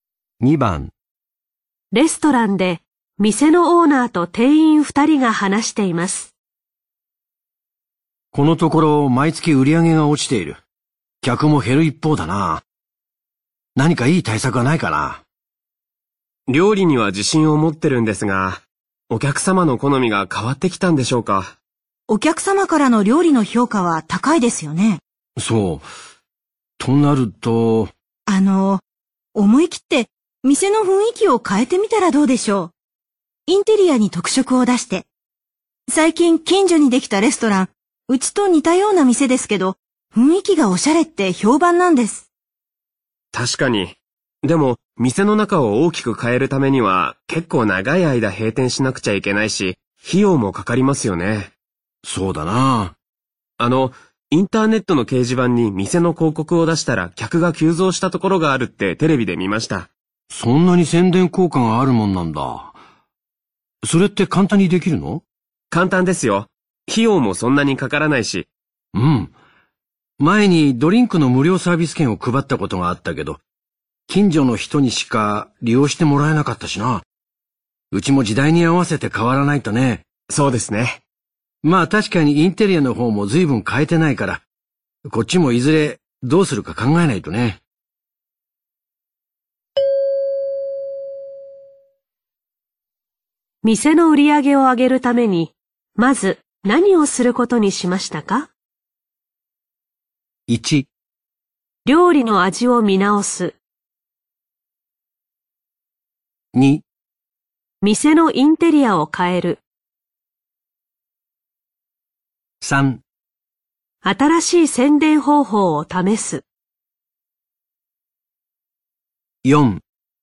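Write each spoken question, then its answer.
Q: 店の売り上げを上げるために、まず何をすることにしましたか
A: 3: 新しい宣伝方法を試す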